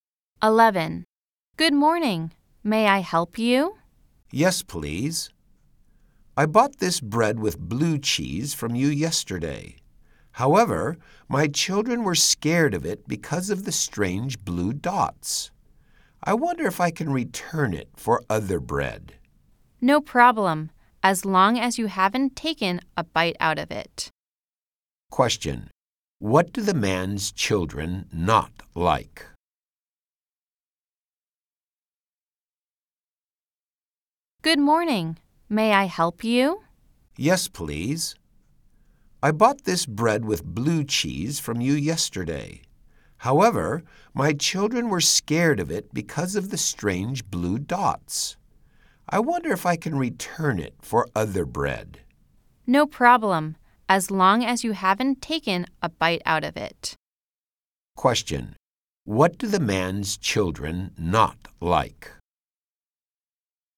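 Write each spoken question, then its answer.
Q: Question. What do the man's children not like?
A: The bread with blue cheese, because of its strange blue dots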